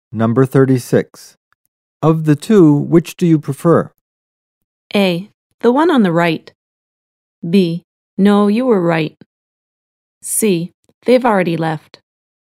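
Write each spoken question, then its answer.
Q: Of the two, which do you prefer?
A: A: The one on the right.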